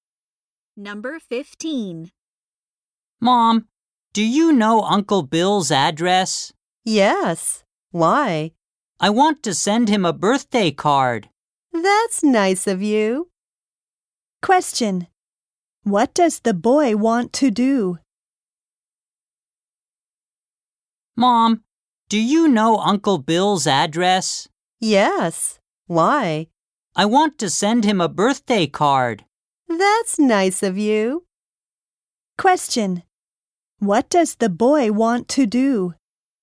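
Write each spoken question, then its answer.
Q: What does the boy want to do?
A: Send Uncle Bill a birthday card.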